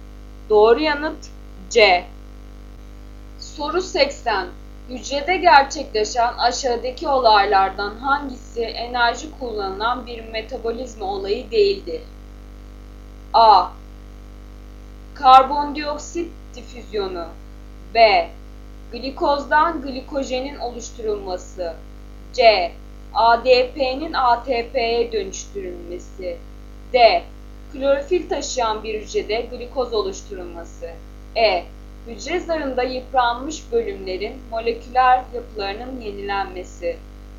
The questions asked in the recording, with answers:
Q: Hücrede gerçekleşen aşağıdaki olaylardan hangisi enerji kullanılan bir metabolizma olayı değildir?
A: Doğru yanıt A.